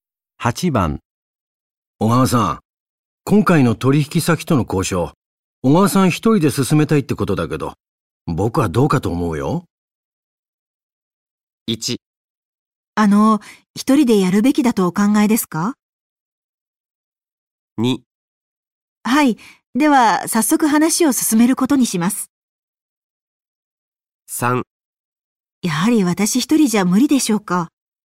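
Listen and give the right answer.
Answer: 3: やはり私一人じゃ無理でしょうか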